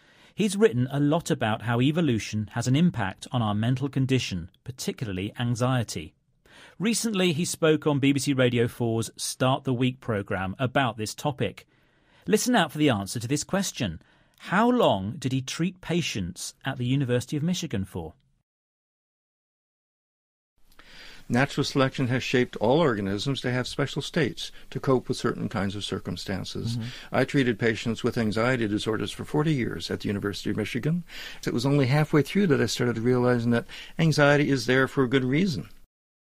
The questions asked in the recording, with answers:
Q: How long did he treat patients at the University of Michigan for?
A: He says that he did that for 40 years.